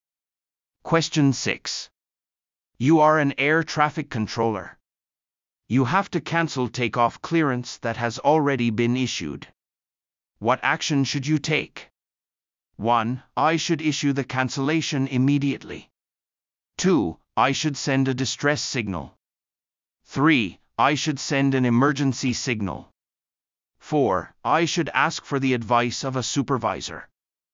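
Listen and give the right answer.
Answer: 1: I should issue the cancellation immediately.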